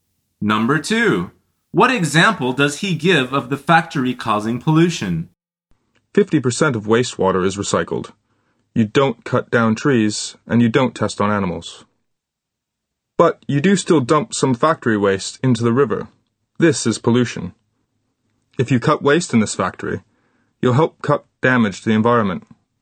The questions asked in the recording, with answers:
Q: what example does he give of the factory causing pollution?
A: The answer is dumping waste in the river.